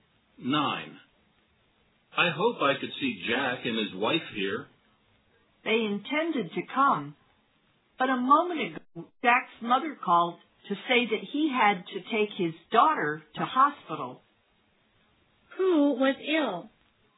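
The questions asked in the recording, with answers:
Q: Who was ill?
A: Jack's daughter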